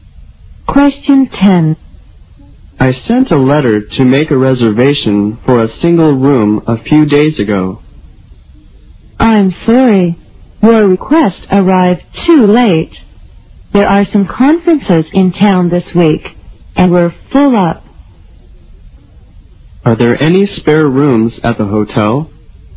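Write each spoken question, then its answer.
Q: Are there any spare rooms at the hotel?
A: No, the hotel is full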